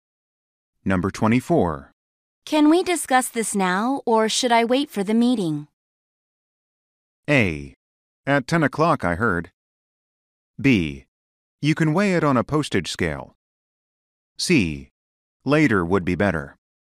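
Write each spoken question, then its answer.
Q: Can we discuss this now, or should I wait for the meeting?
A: C: Later would be better.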